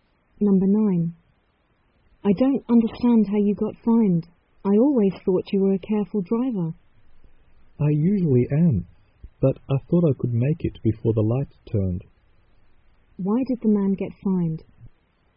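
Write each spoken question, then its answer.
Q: Why did the man get fined?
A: He drove through a red light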